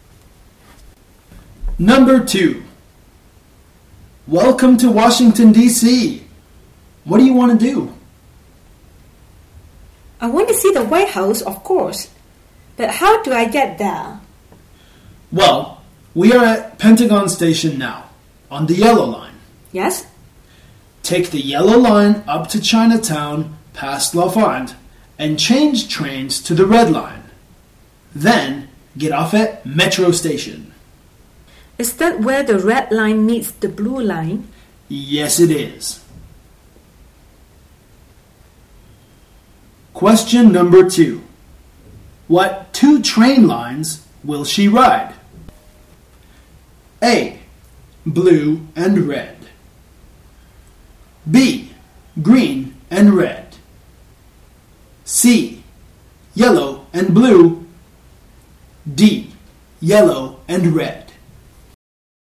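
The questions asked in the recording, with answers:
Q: What 2 train lines will she ride?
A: D: Yellow and red.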